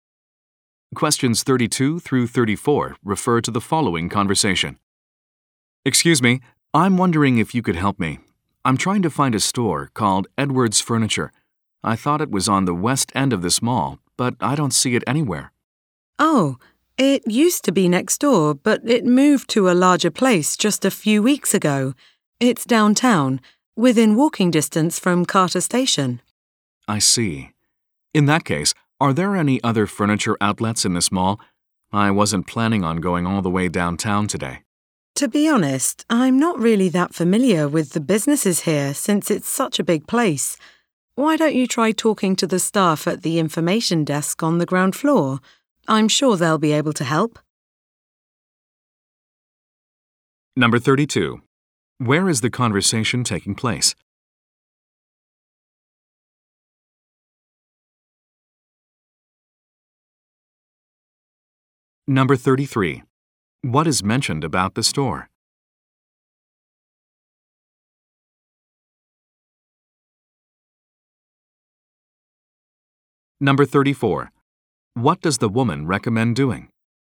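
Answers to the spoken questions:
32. In a shopping mall
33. It moved to a larger place downtown
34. Asking staff at the information desk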